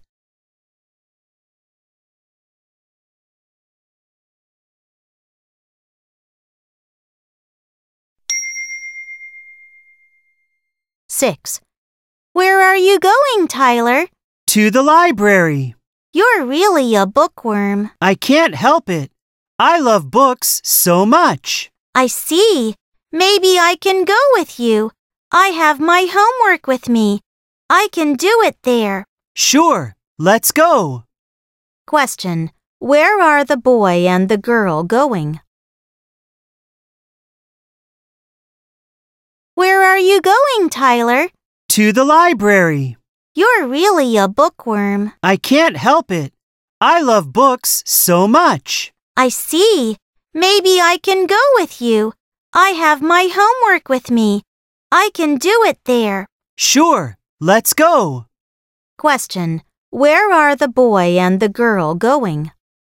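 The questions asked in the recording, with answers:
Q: Where are the boy and the girl going?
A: To the library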